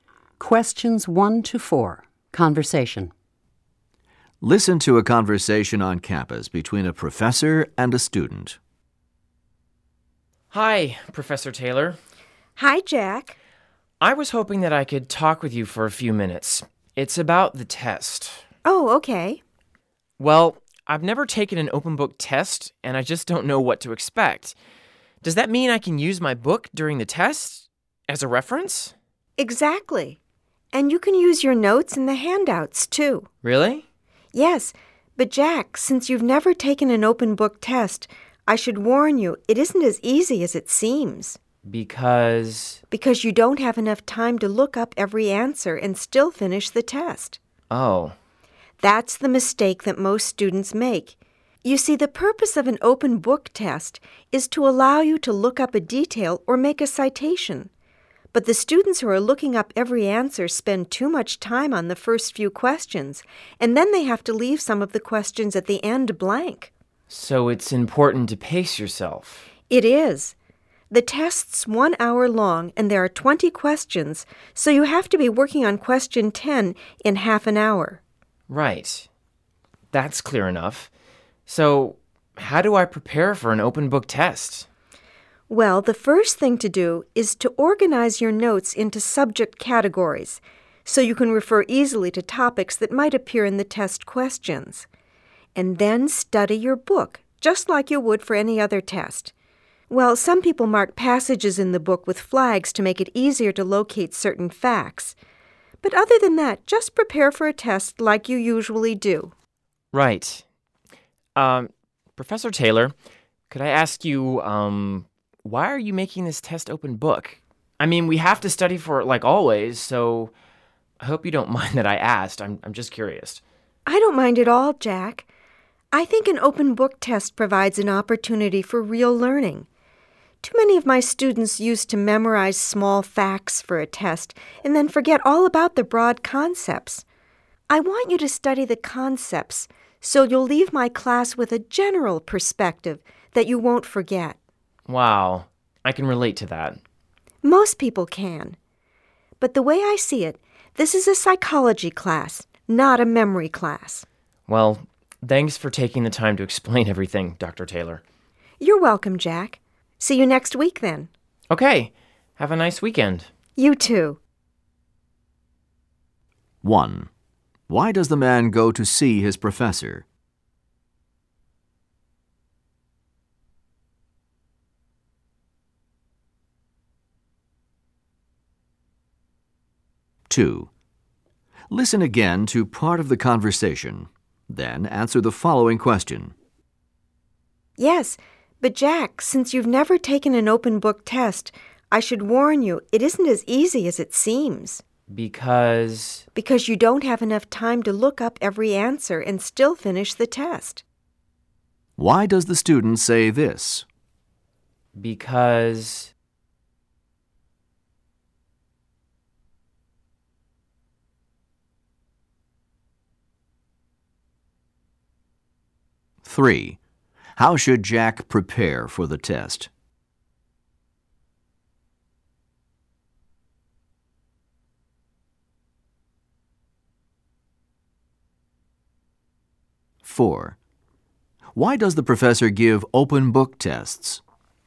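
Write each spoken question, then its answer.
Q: Why does the man go to see his professor?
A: To ask about the open book test and what to expect

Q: How should Jack prepare for the test?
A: Organize his notes by subject and study the book as for any other test

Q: Why does the professor give open book tests?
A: So students learn broad concepts instead of memorizing small facts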